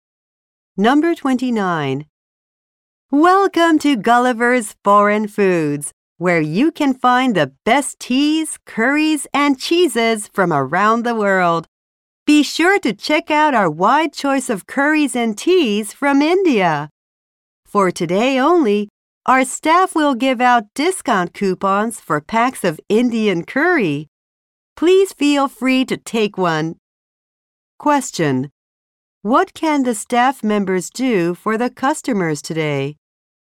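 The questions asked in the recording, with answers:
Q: What can the staff members do for the customers today?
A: Give them discount coupons for Indian curry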